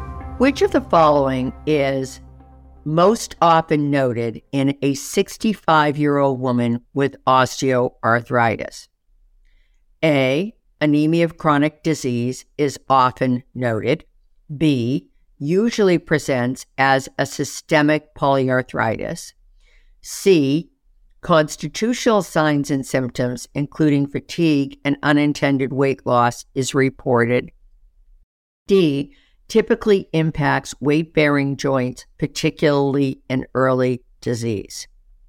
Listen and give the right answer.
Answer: D is, of course, the correct answer.